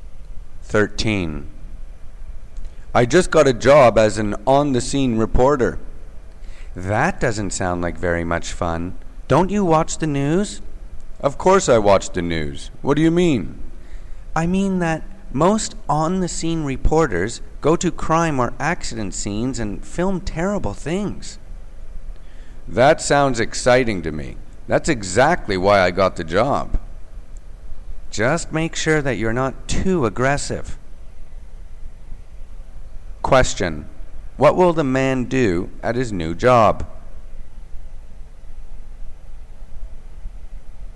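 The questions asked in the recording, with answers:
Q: What will the man do at his new job?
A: Report from crime or accident scenes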